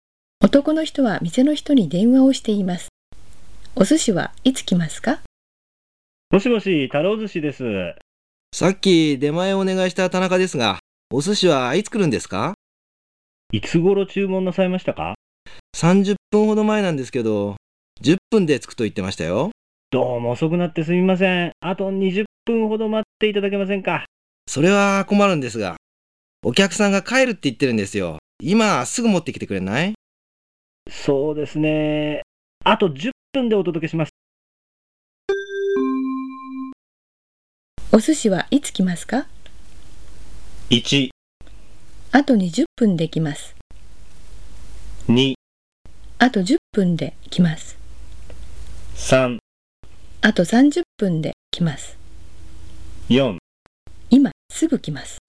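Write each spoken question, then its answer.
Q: お寿司はいつ来ますか?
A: 2: あと10分で来ます。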